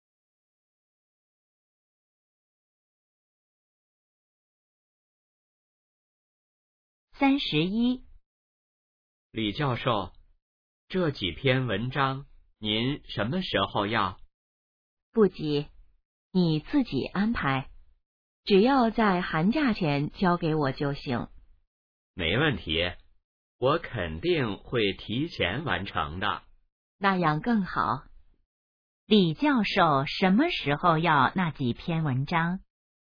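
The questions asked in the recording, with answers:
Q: 李教授什么时候要那几篇文章?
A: 寒假前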